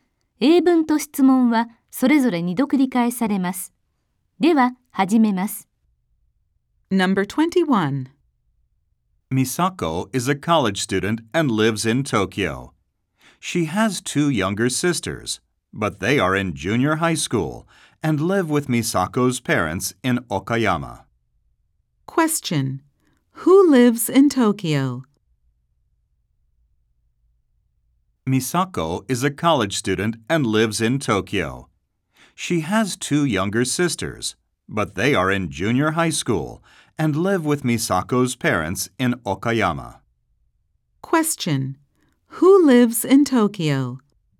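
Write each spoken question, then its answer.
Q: Who lives in Tokyo?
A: Misako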